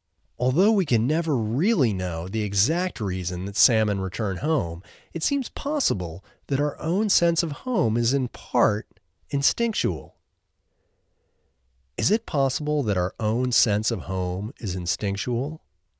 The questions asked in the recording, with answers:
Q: Is it possible that our own sense of home is instinctual?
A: Yes, it's possible that our own sense of home is instinctual.